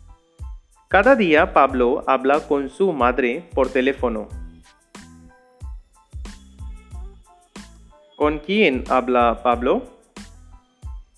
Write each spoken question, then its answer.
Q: ¿Con quién habla Pablo?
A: Pablo habla con su madre cada día por teléfono.